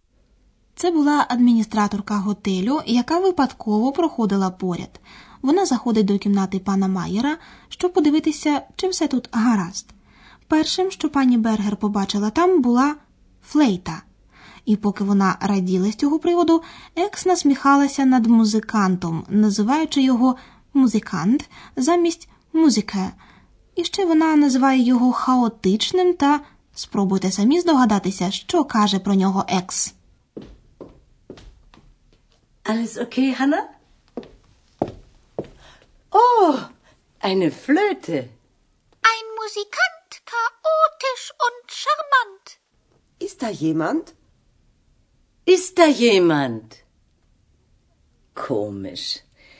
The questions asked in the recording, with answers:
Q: Спробуйте самі здогадатися, що каже про нього Екс.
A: Екс називає музиканта «шамант» – чудовим або чарівним.